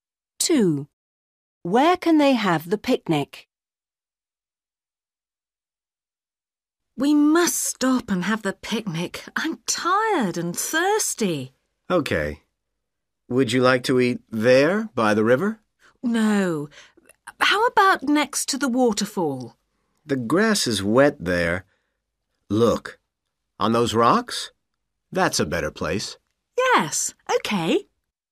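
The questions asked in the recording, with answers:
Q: Where can they have the picnic?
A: On the rocks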